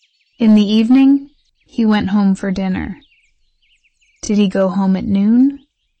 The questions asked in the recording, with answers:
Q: Did he go home at noon?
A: No, he didn't.